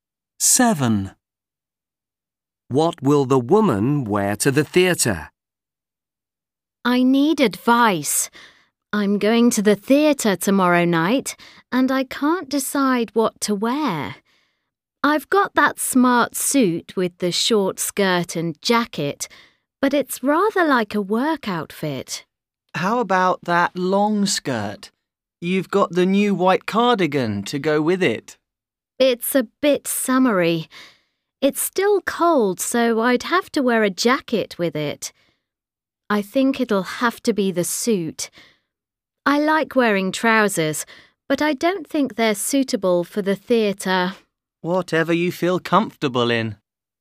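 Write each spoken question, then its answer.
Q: What will the woman wear to the theatre?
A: The suit (short skirt and jacket)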